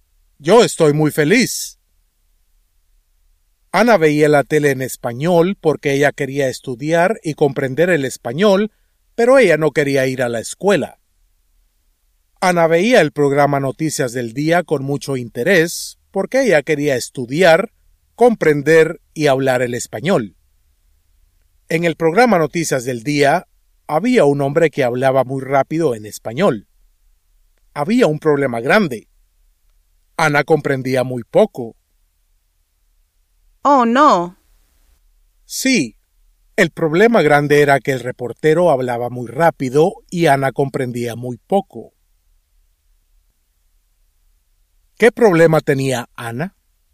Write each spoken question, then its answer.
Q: ¿Qué problema tenía Ana?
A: En el programa Noticias del Día, había un hombre que hablaba muy rápido en español y Ana comprendía muy poco.